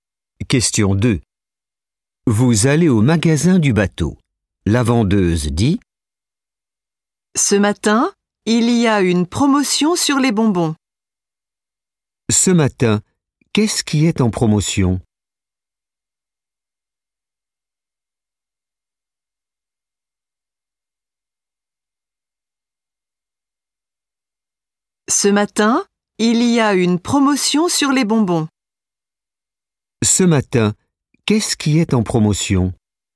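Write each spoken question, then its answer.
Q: Ce matin, qu'est-ce qui est en promotion ?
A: Les bonbons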